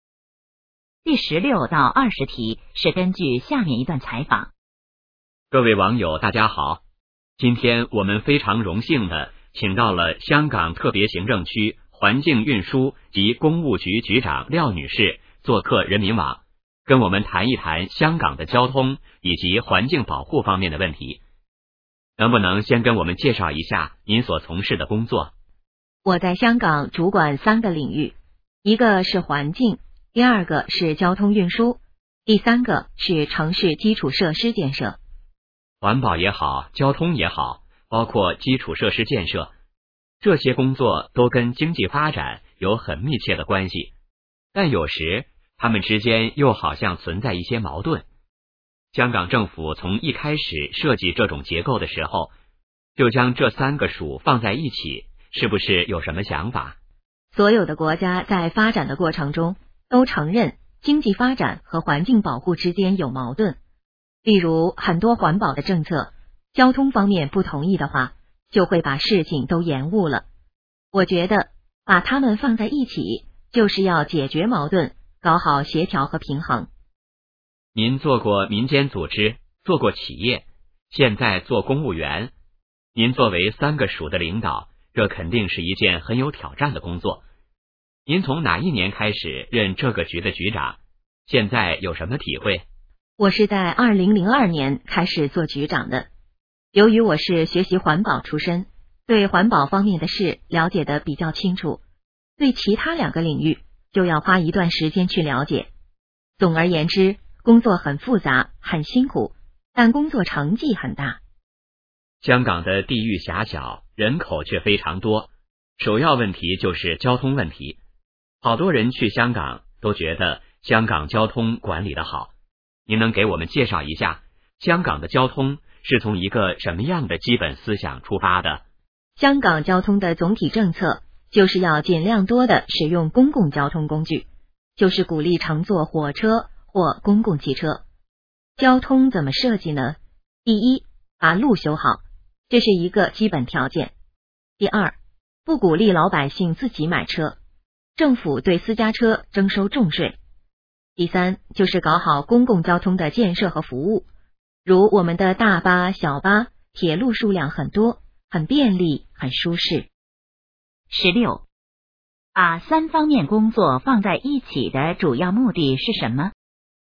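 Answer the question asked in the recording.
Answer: 解决矛盾,搞好协调和平衡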